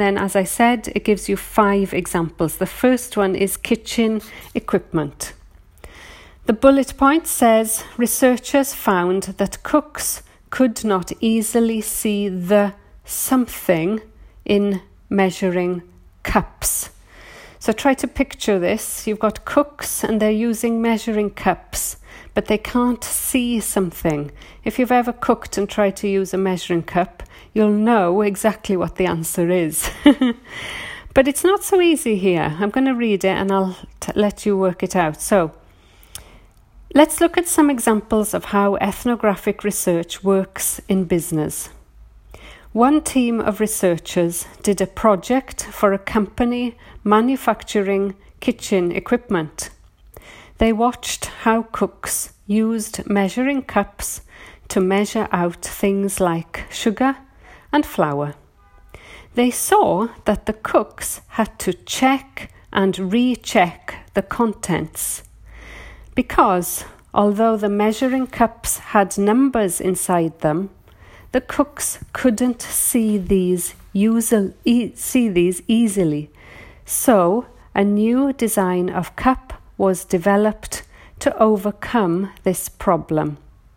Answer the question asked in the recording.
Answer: So the answer is the numbers, or one word, numbers, and it's plural S.